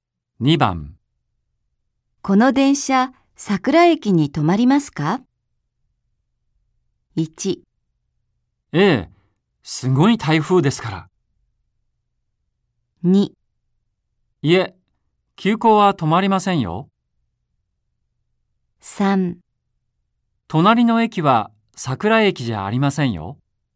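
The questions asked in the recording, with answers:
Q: この電車桜駅に止まりますか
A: 2: いえ、急行は止まりませんよ。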